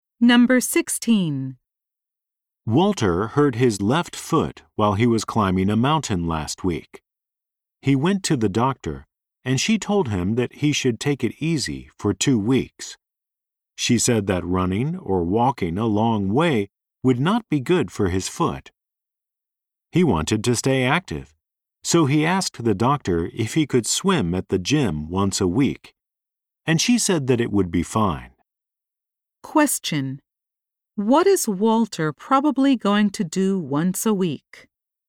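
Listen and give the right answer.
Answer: Go swimming at the gym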